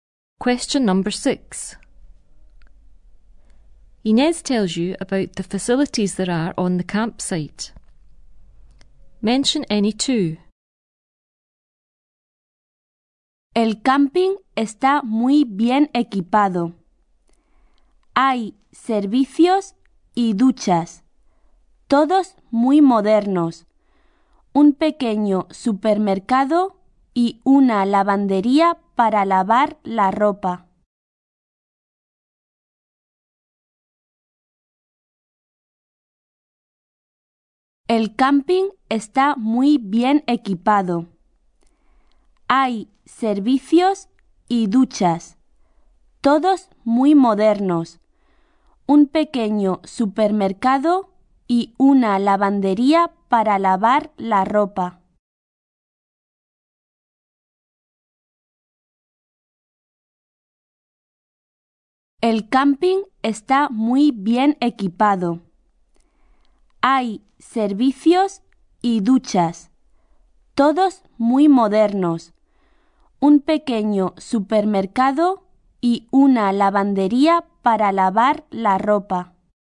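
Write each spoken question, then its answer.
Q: Inez tells you about the facilities there are on the campsite.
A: Toilets, showers, a small supermarket, a launderette (any two)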